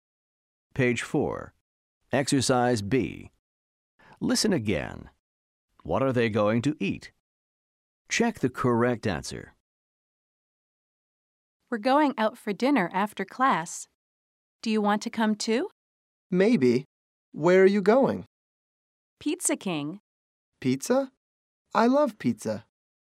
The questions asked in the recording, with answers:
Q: What are they going to eat?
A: The answer is pizza. They're going to eat pizza.